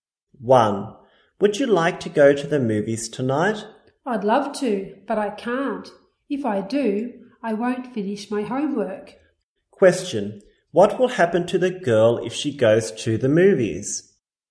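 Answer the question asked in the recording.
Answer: She won't finish her homework.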